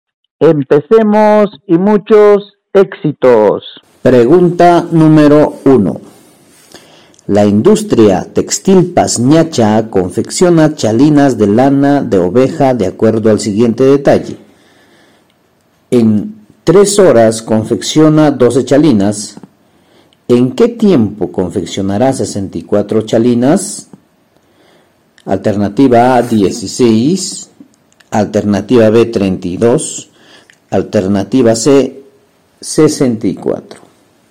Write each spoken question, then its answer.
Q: ¿En qué tiempo confeccionará 64 chalinas?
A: La A, profesor, 16.